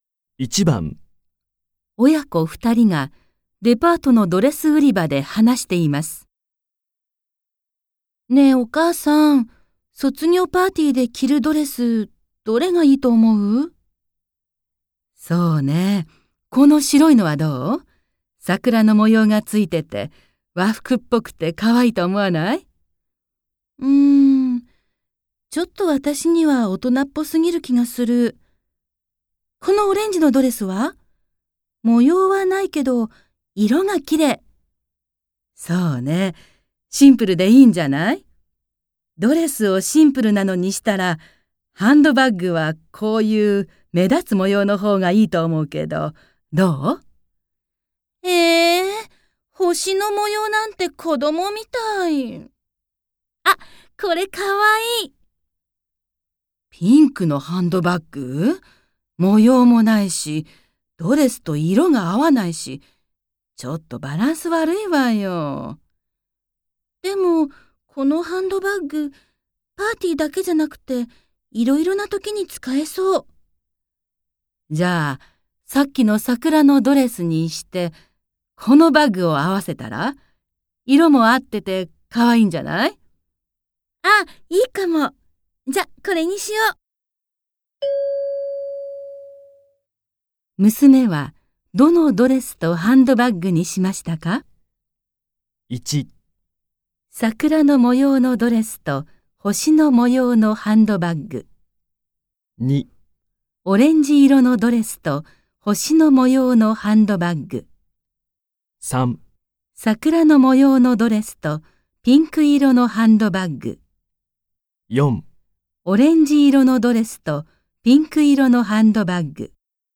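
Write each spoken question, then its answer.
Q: 娘はどのドレスとハンドバッグにしましたか ?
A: 3: 桜の模様のドレスとピンク色のハンドバッグ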